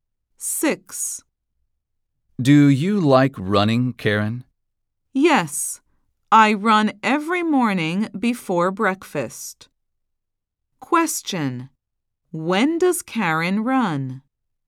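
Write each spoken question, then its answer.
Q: When does Karen run?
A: Every morning before breakfast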